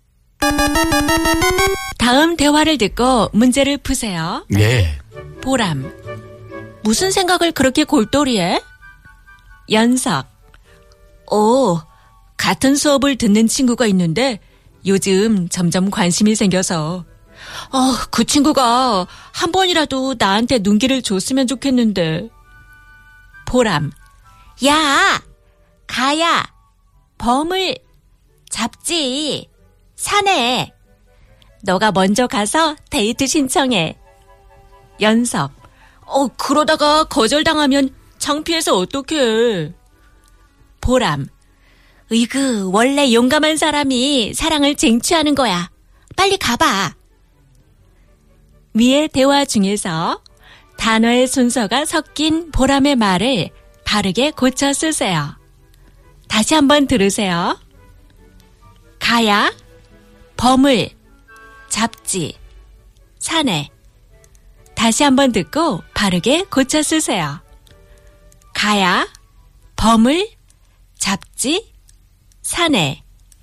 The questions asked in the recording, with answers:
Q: 위의 대화 중에서 단어의 순서가 섞인 보람의 말을 바르게 고쳐 쓰세요.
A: 산에 가야. 범을 잡지.